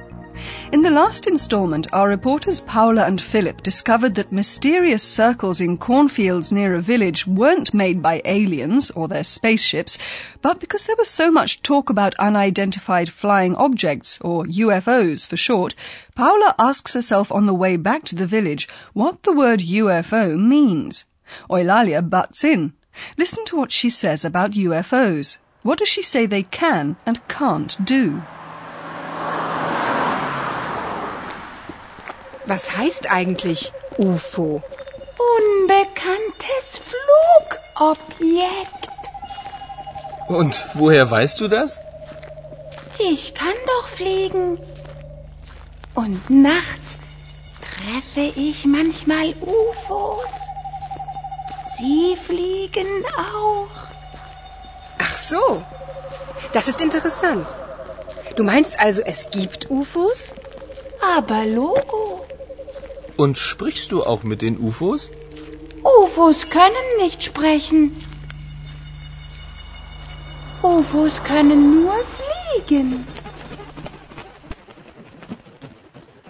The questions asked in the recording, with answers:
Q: What does she say they can and can't do?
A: In Eulalia's opinion, anyway, UFOs can only fly.